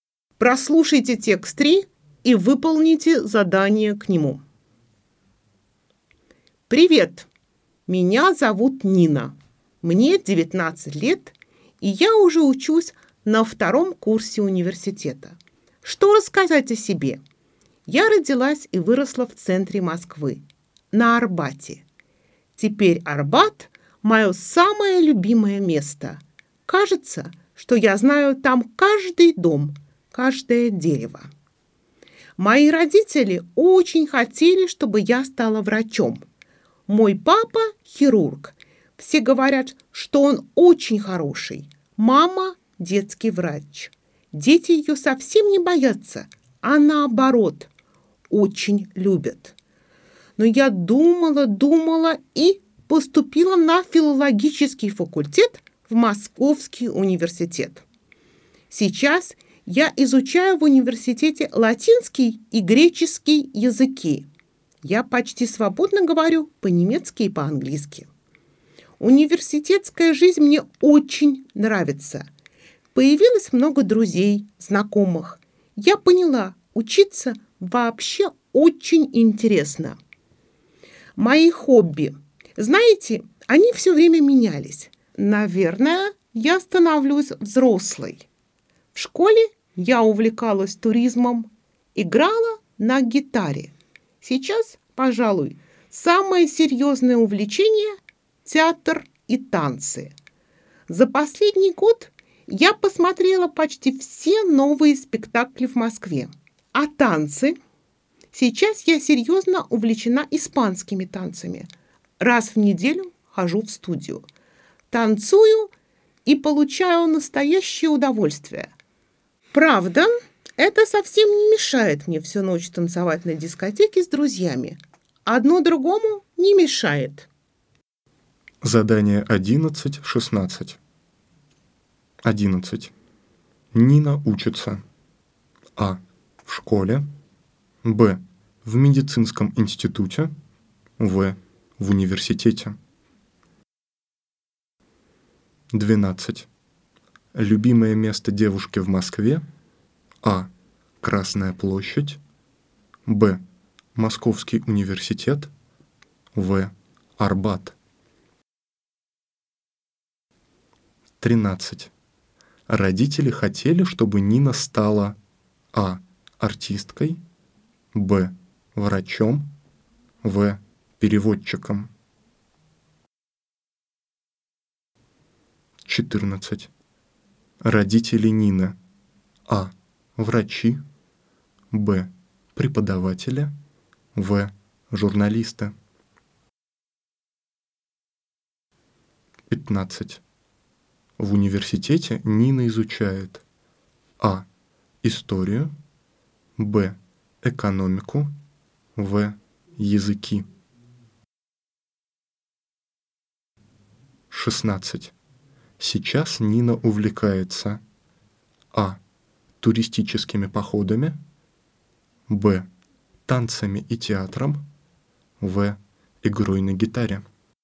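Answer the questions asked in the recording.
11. в: в университете
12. в: Арбат
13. б: врачом
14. А: Врачи.
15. В: Языки.
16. Б: Танцами и театром.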